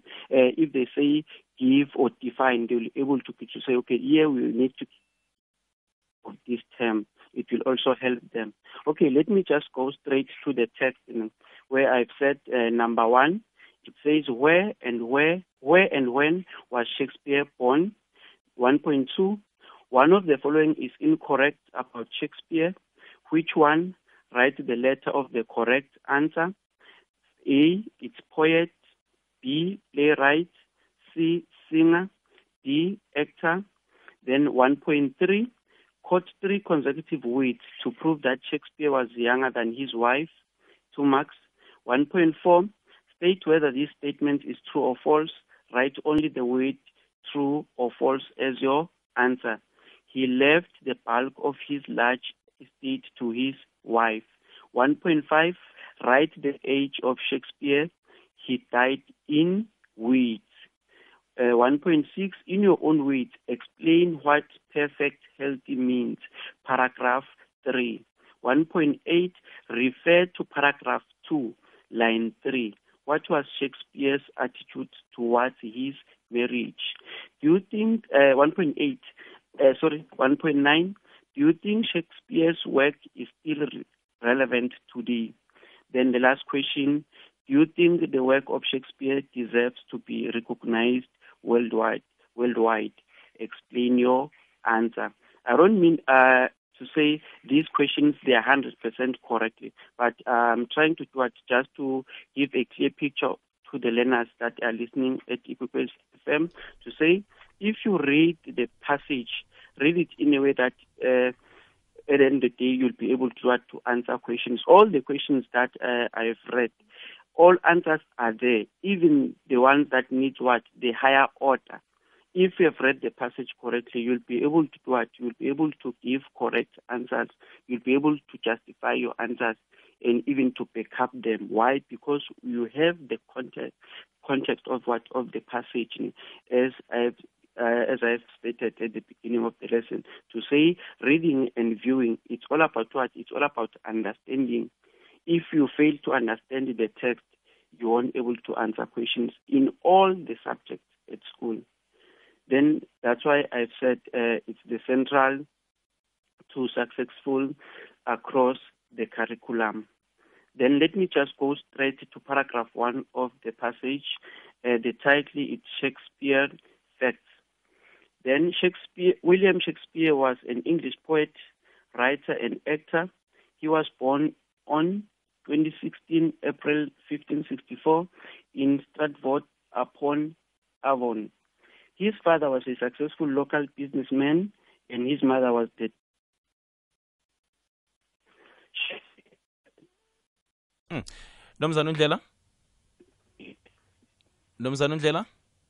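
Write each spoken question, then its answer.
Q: One of the following is incorrect about Shakespeare. Which one? write the letter of the correct answer. A, it's poet. B, playwright. C, singer. D, actor.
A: C: singer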